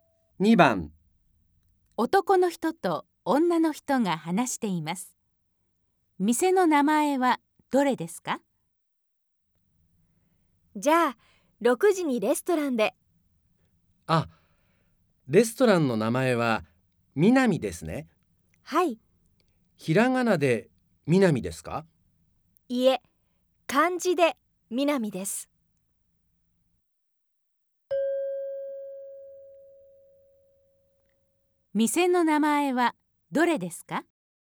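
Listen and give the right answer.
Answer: 漢字の「南」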